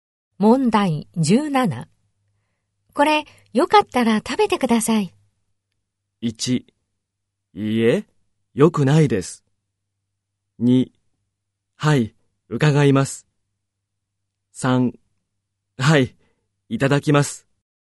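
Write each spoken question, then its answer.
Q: これ、よかったら食べてください。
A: 1: はい、いただきます。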